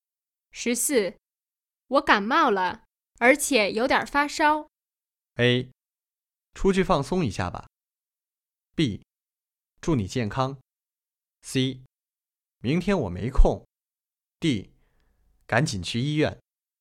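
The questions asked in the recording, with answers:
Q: 我感冒了,而且有点发烧。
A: D: 赶紧去医院。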